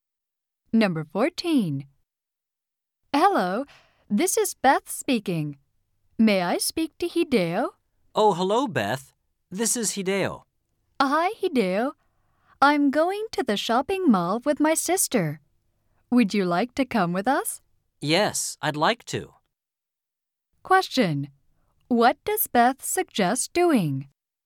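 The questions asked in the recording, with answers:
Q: What does Beth suggest doing?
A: Going to the shopping mall together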